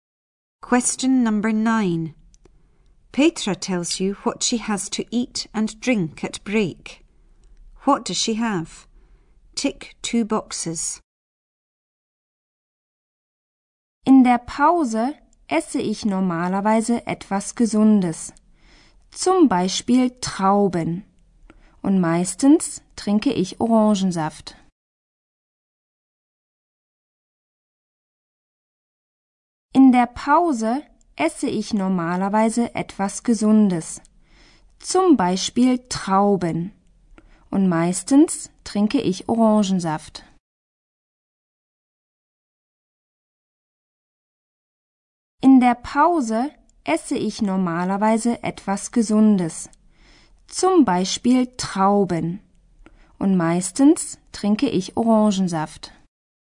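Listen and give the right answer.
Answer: Grapes and orange juice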